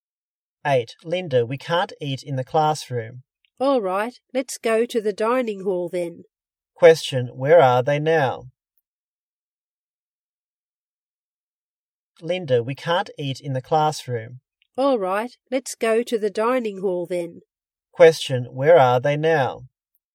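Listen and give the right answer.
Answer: In the classroom.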